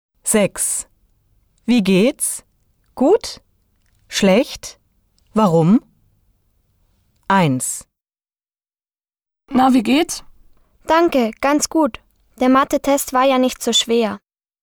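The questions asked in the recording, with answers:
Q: Wie geht's? Gut? Schlecht? Warum?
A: Gut – der Mathe-Test war nicht so schwer.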